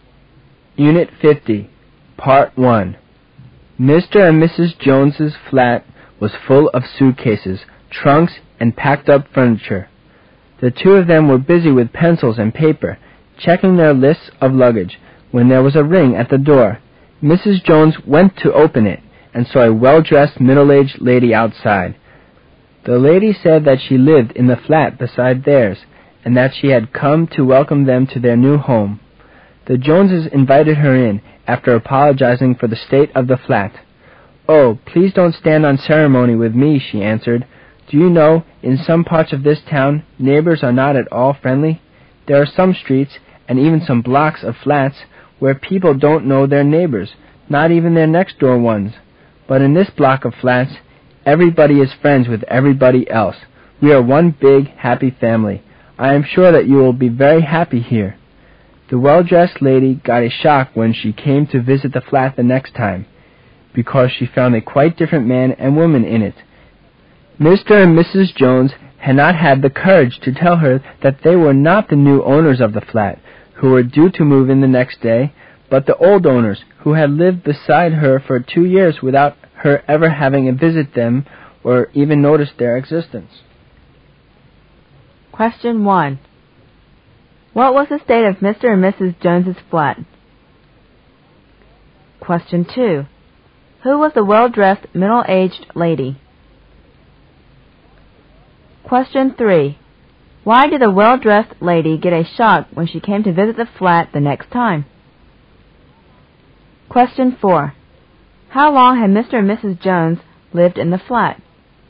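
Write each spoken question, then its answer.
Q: What was the state of Mr. and Mrs. Jones's flat?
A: Full of suitcases, trunks and packed-up furniture

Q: Who was the well-dressed, middle-aged lady?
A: Their next-door neighbor

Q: Why did the well-dressed lady get a shock when she came to visit the flat the next time?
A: She found different people living there

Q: How long had Mr. and Mrs. Jones lived in the flat?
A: Two years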